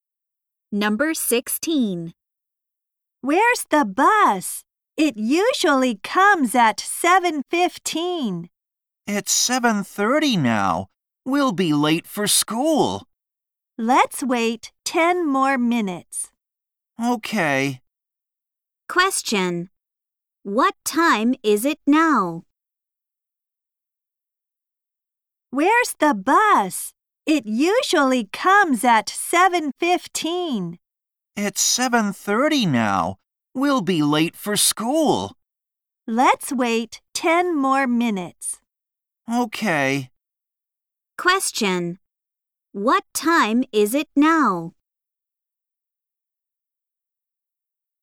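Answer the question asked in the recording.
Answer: 7:30.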